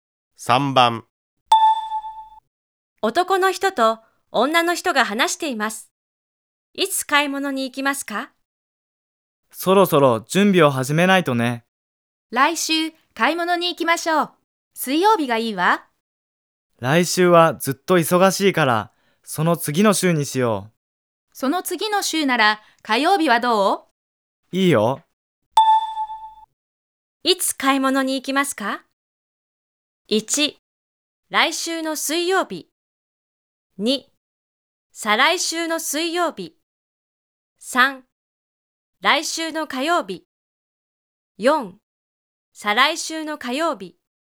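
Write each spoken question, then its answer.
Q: いつ買い物に行きますか?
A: 4: 再来週の火曜日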